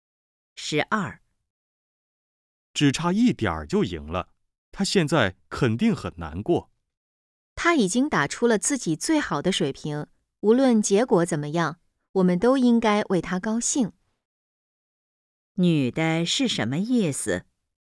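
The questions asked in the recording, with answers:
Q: 女的是什么意思?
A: 应该为他高兴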